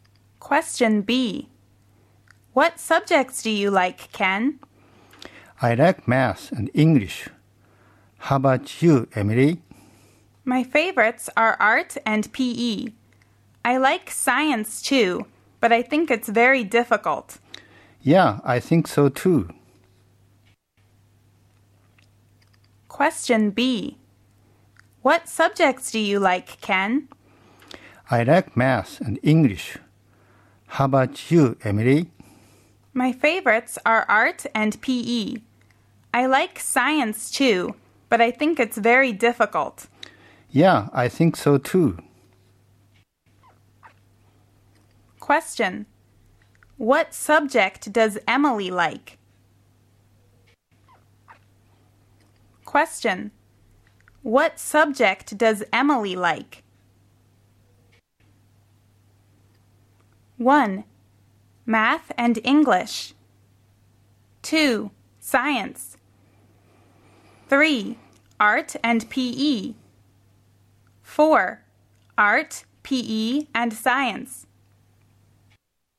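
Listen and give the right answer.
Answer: 3: Art and PE.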